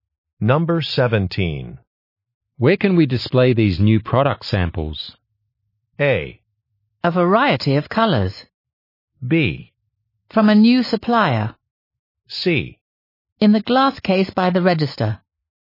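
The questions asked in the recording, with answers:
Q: Where can we display these new product samples?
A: C: In the glass case by the register.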